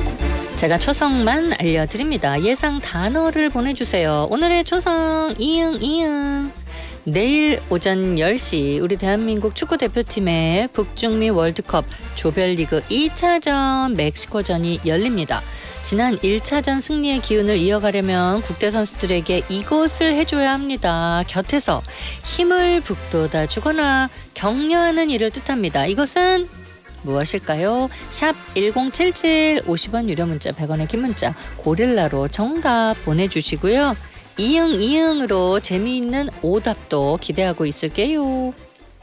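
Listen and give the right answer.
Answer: 응원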